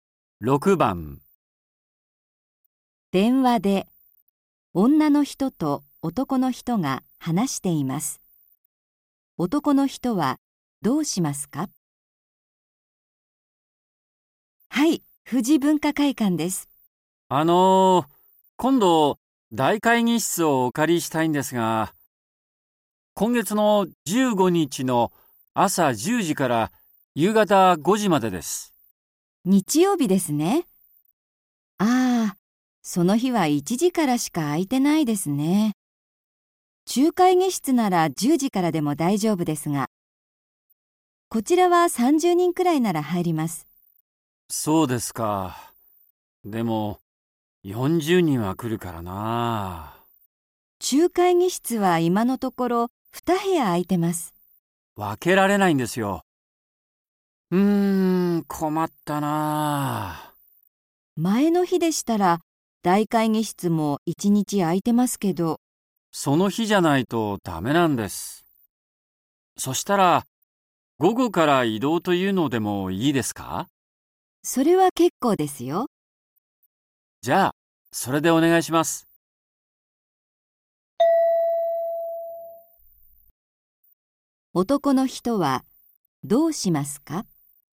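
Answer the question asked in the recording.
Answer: 15日の午前は中会議室を使い、午後から大会議室に移動する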